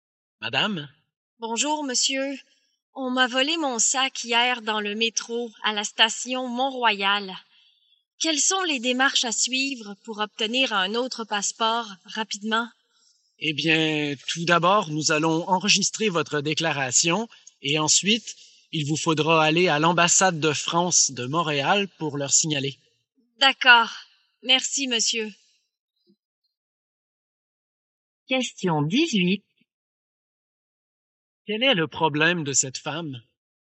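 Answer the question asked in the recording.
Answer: On lui a volé son sac avec son passeport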